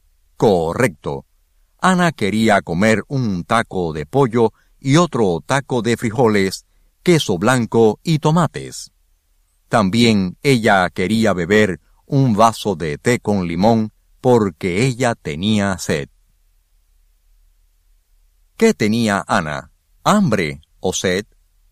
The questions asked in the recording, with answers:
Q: ¿Qué tenía Ana? ¿Hambre o sed?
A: Ana tenía hambre y también tenía sed.